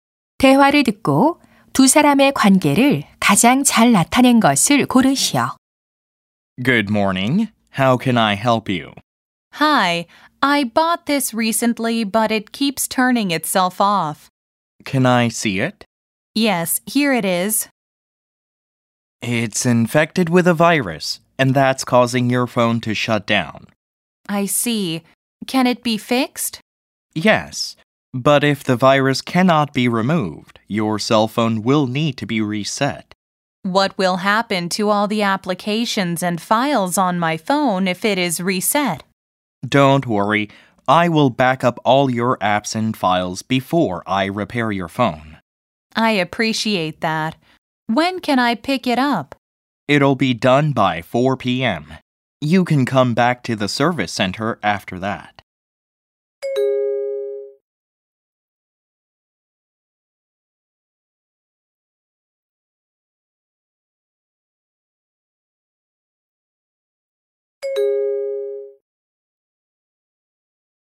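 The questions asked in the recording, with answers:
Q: 대화를 듣고 두 사람의 관계를 가장 잘 나타낸 것을 고르시오.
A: 휴대전화 수리 기사 - 고객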